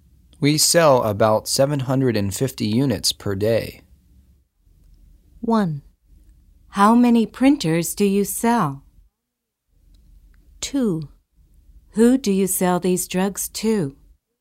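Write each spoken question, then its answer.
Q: We sell about 750 units per day.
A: 1: How many printers do you sell?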